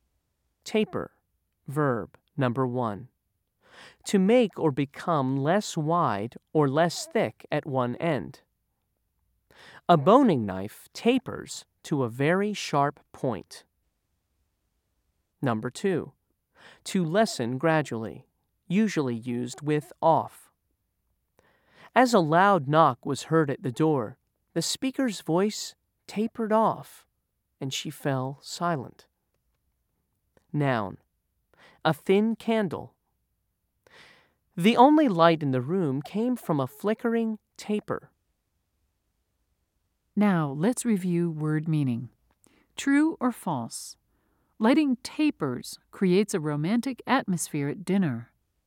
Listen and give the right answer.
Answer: If you said true, you're correct.